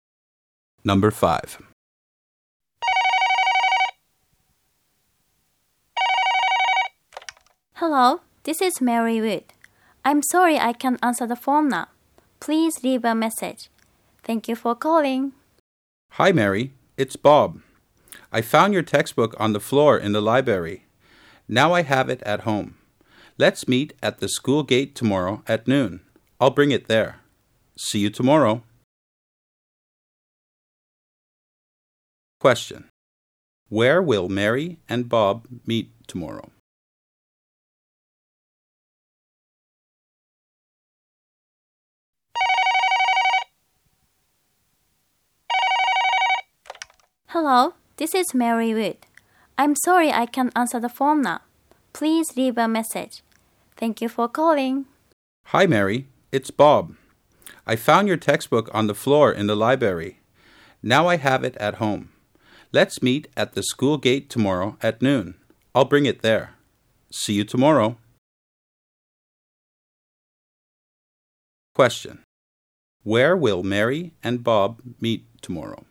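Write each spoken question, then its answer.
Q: Question. Where will Mary and Bob meet tomorrow?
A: At the school gate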